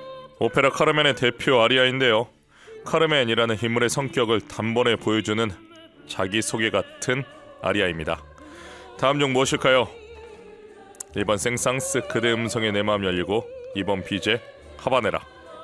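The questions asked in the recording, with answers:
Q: 다음 중 무엇일까요? 1번 생상스, 그대 음성에 내 마음 열리고, 2번 비제, 하바네라.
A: 2번: 비제, 하바네라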